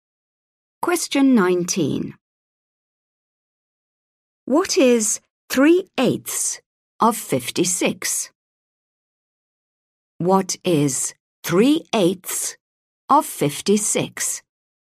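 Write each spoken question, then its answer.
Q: What is 3/8 of 56?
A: 21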